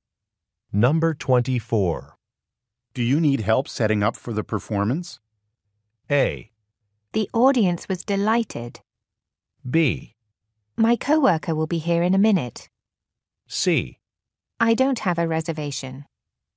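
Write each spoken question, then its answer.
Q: Do you need help setting up for the performance?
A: B: My coworker will be here in a minute.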